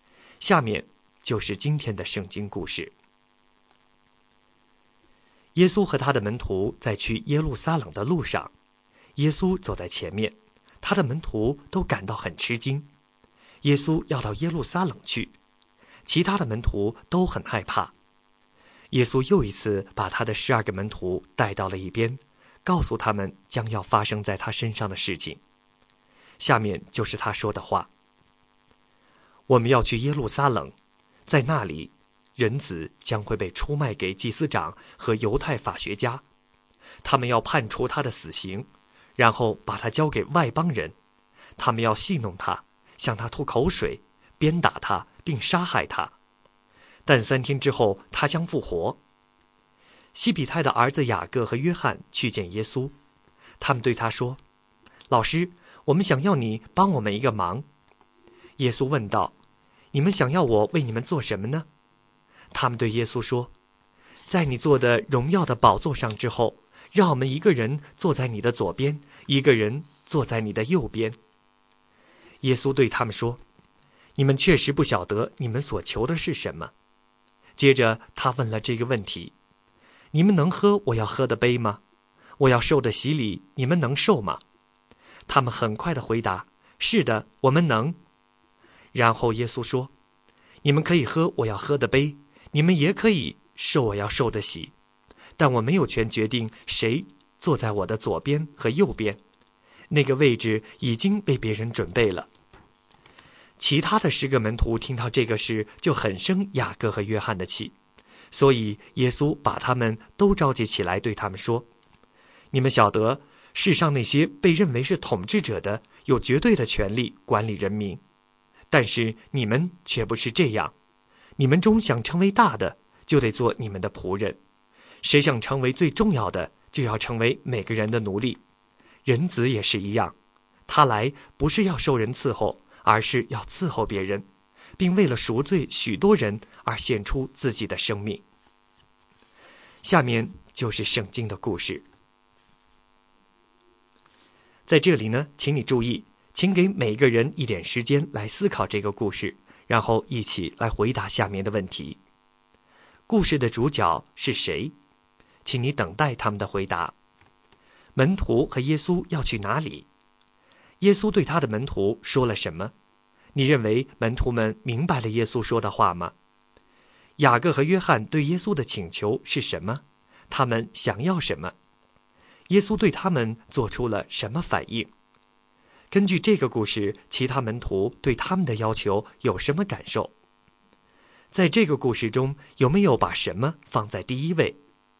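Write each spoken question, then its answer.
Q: 门徒和耶稣要去哪里?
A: 耶路撒冷

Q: 耶稣对他的门徒说了什么?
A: 人子将被出卖给祭司长和犹太法学家,被判死刑,交给外邦人戏弄、吐口水、鞭打并杀害,但三天后复活

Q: 雅各和约翰对耶稣的请求是什么?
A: 在耶稣的荣耀宝座上,让他们一个坐在他左边,一个坐在他右边

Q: 耶稣对他们做出了什么反应?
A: 说他们不知道自己求的是什么;他们能喝他的杯、受他的洗,但谁坐他左右不由他决定,那位置已为别人预备

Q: 根据这个故事,其他门徒对他们的要求有什么感受?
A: 很生雅各和约翰的气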